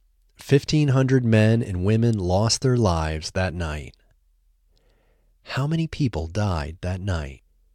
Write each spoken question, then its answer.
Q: How many people died that night?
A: 1,500 people died that night.